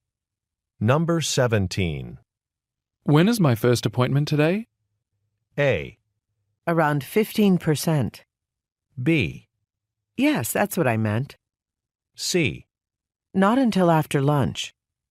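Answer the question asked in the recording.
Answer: C: Not until after lunch.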